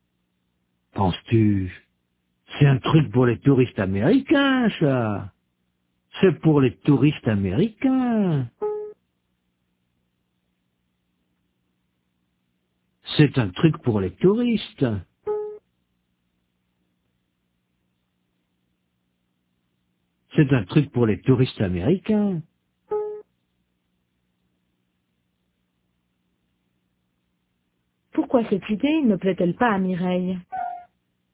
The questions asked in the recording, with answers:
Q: Pourquoi cette idée ne plaît-elle pas à Mireille?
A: Parce que c'est un truc pour les touristes américains.